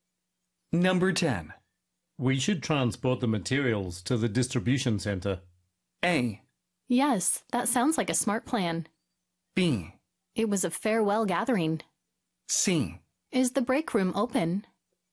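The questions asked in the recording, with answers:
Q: We should transport the materials to the distribution center.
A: A: Yes, that sounds like a smart plan.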